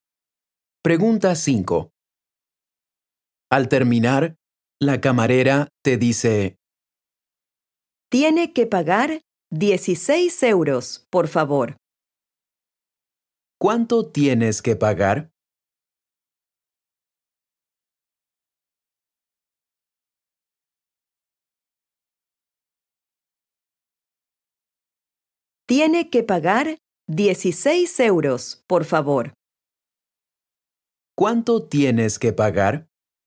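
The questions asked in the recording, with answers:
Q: ¿Cuánto tienes que pagar?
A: 16 euros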